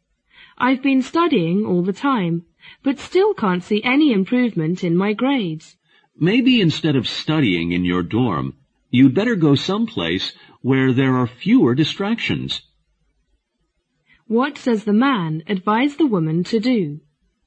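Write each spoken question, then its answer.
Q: What does the man advise the woman to do?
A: Study somewhere with fewer distractions instead of in her dorm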